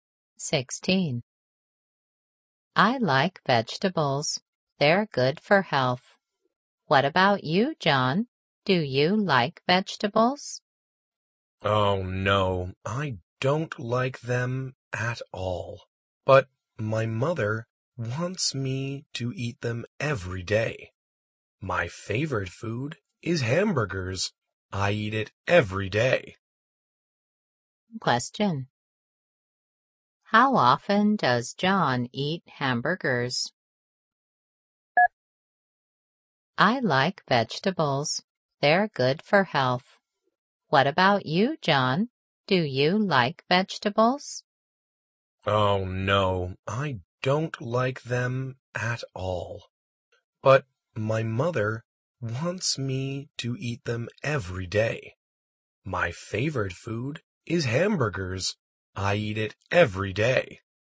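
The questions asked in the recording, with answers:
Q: How often does John eat hamburgers?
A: Every day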